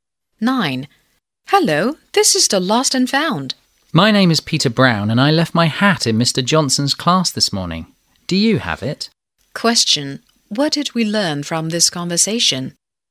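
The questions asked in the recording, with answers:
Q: What did we learn from this conversation?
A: Peter Brown lost his hat in Mr. Johnson's class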